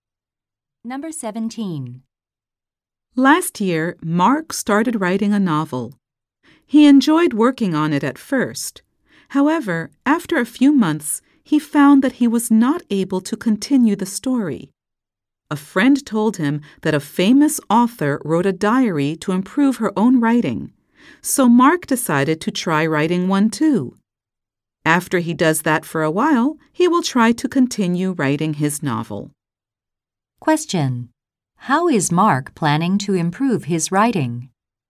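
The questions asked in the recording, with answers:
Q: How is Mark planning to improve his writing?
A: By writing a diary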